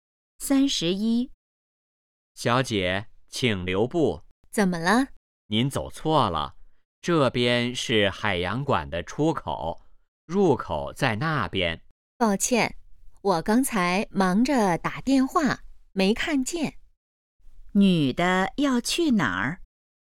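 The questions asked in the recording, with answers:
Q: 女的要去哪儿?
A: 海洋馆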